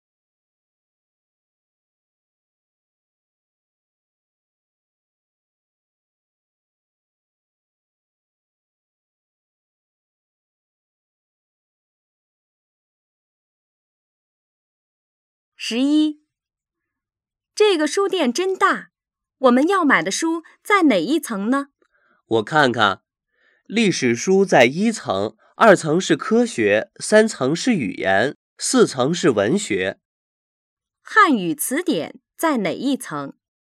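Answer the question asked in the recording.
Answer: 3层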